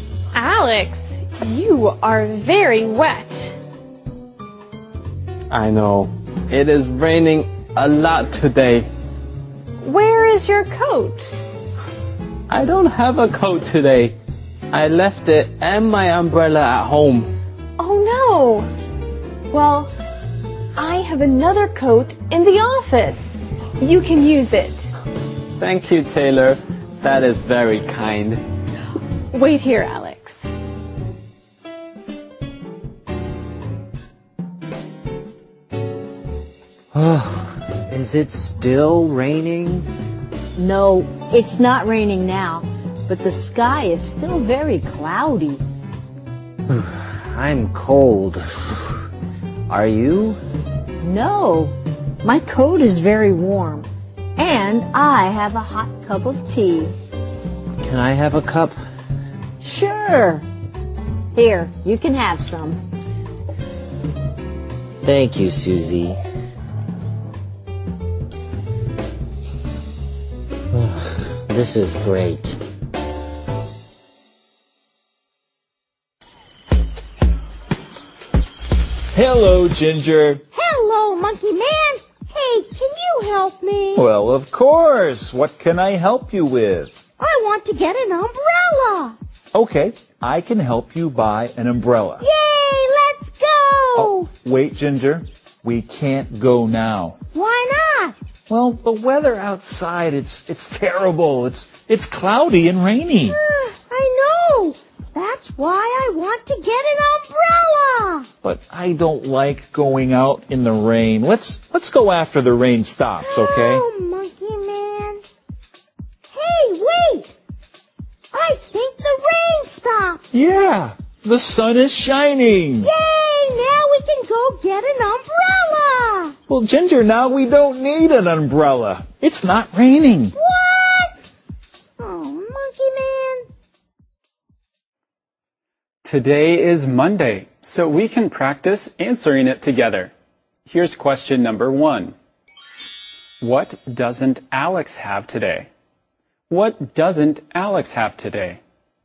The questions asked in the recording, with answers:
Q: What doesn't Alex have today?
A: He doesn't have his coat or his umbrella.